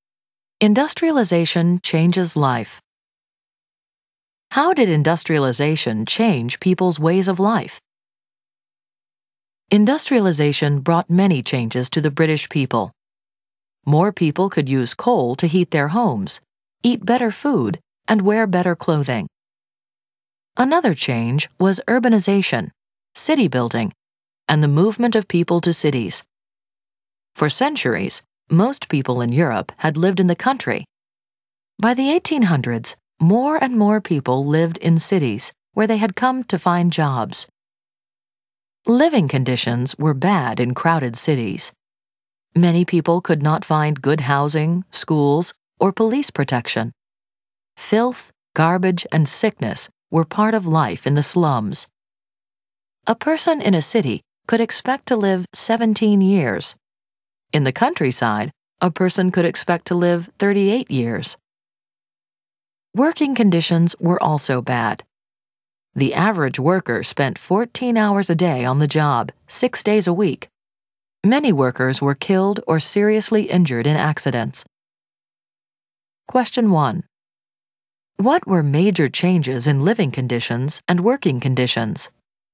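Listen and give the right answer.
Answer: Cities became crowded and dirty, with poor housing, schools and police protection, and shorter lives; workers worked 14 hours a day, 6 days a week, and accidents were common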